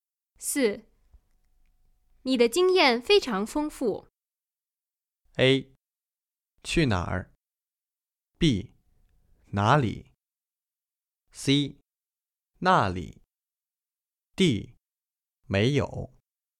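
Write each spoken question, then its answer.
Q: 你的经验非常丰富。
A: B: 哪里?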